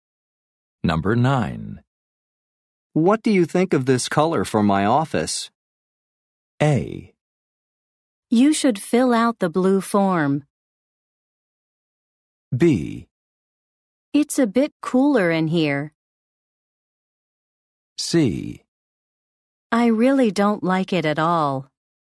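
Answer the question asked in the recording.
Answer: C: I really don't like it at all.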